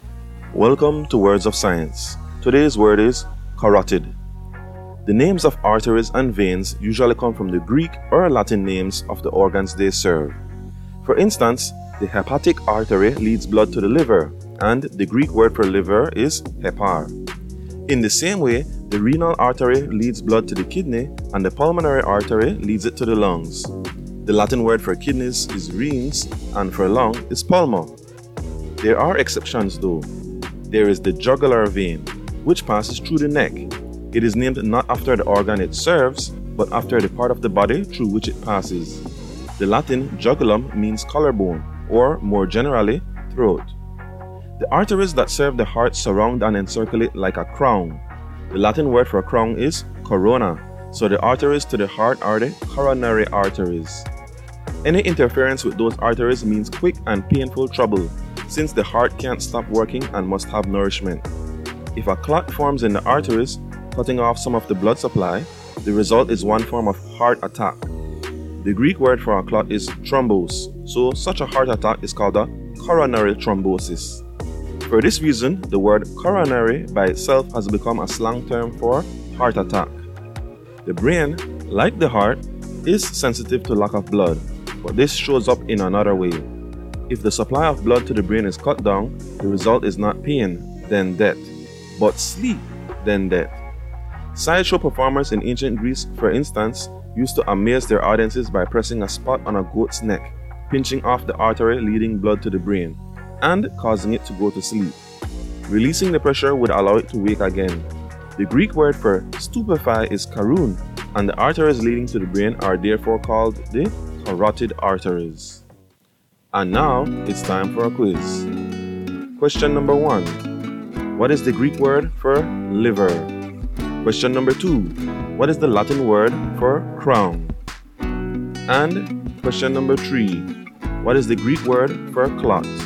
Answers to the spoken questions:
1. hepar
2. corona
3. thrombosis